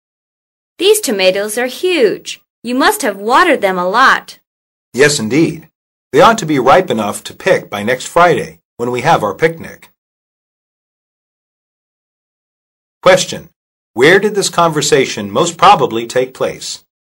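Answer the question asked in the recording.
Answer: In a garden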